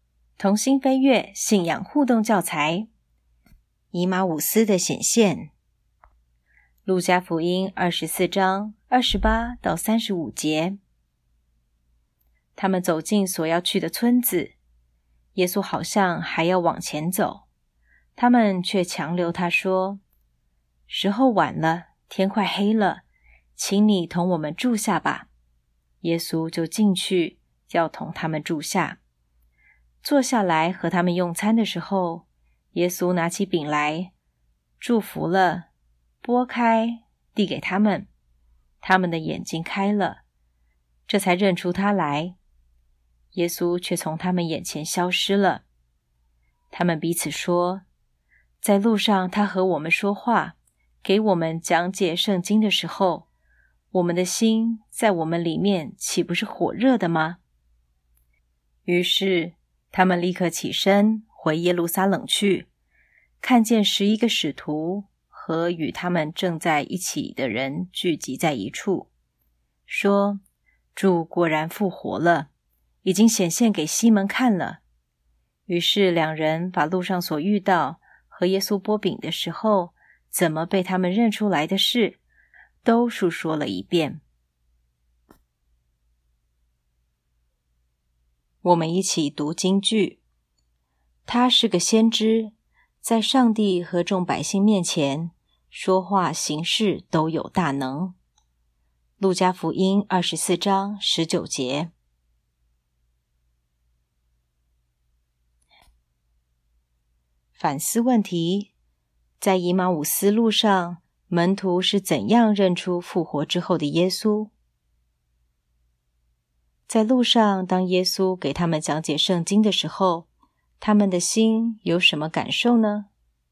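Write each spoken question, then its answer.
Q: 在以马忤斯路上,门徒是怎样认出复活之后的耶稣?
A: 耶稣拿起饼来,祝福了,擘开递给他们的时候,他们的眼睛开了,认出他来

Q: 在路上,当耶稣给他们讲解圣经的时候,他们的心有什么感受呢?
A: 心里火热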